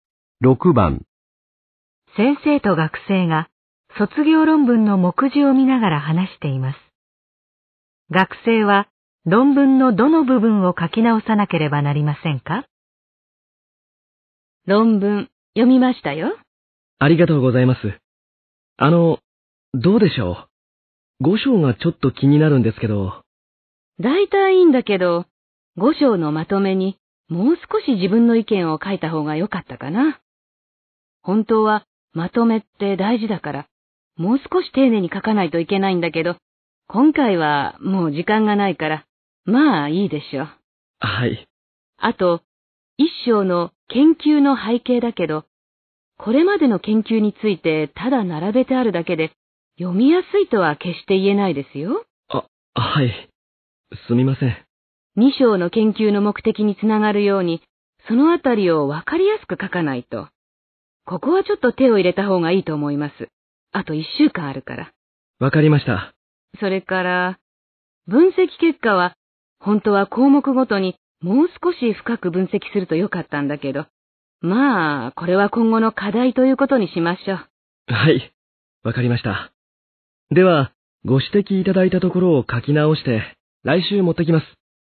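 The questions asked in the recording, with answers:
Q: 学生は論文のどの部分を書き直さなければなりませんか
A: 1章の研究の背景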